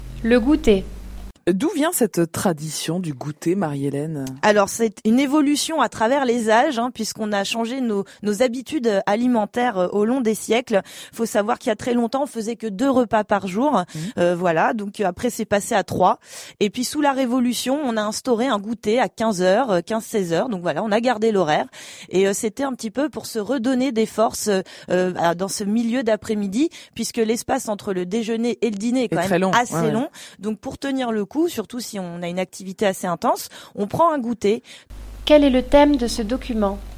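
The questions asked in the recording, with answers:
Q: Quel est le thème de ce document ?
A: L'origine de la tradition du goûter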